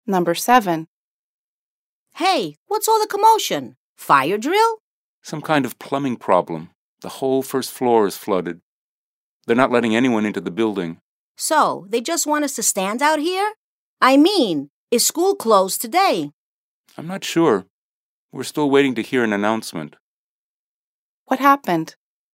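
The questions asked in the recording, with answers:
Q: What happened?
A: A plumbing problem flooded the whole first floor, so no one is allowed into the building.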